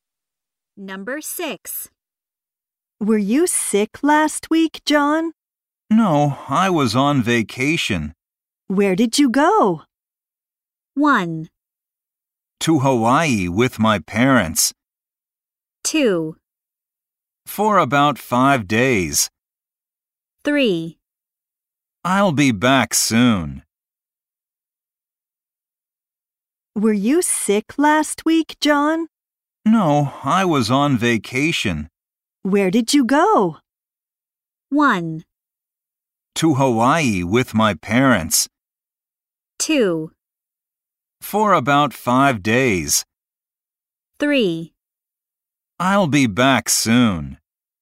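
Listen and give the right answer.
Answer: 1: To Hawaii with my parents.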